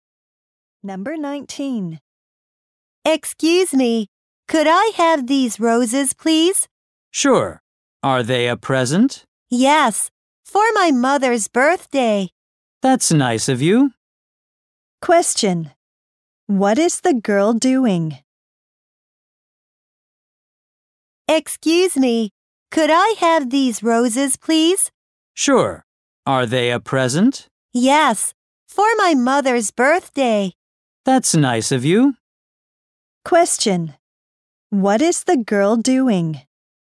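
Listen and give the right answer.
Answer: Buying roses for her mother's birthday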